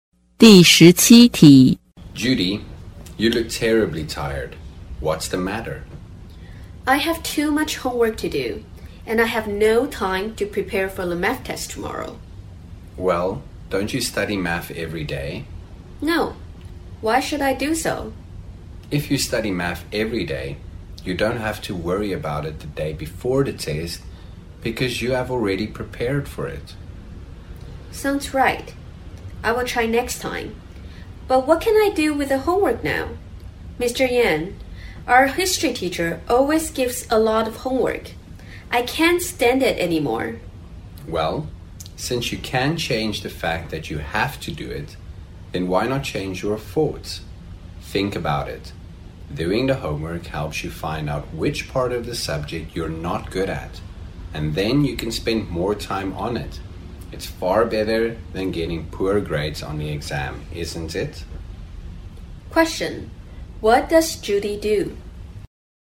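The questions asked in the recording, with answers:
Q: What does Judy do?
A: She is a student.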